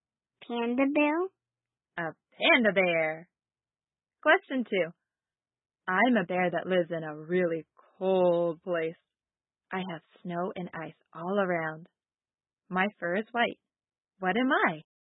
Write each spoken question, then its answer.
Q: What am I?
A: I'm a polar bear.